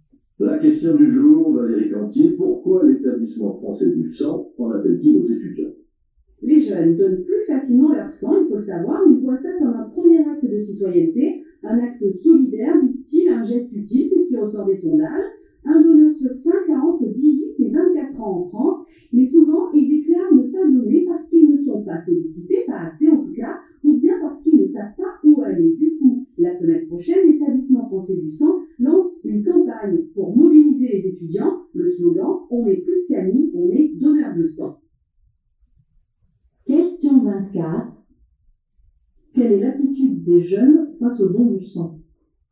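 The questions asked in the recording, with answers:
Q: Quelle est l'attitude des jeunes face au don du sang ?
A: Ils donnent plus facilement leur sang, le voyant comme un acte citoyen et solidaire.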